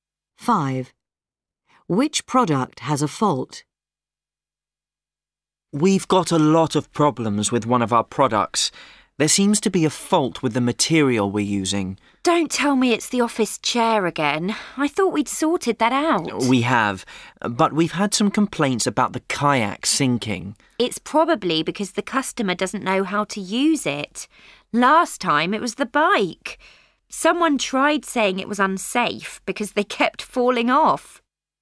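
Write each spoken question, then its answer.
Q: Which product has a fault?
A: The kayak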